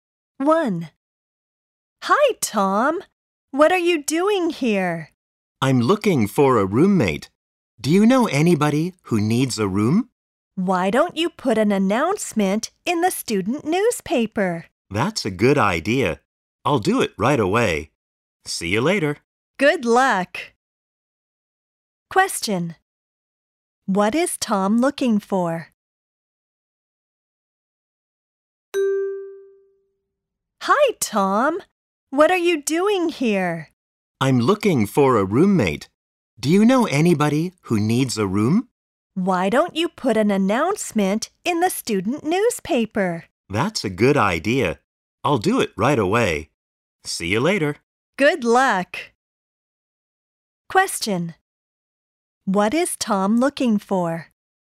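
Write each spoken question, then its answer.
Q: What is Tom looking for?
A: A roommate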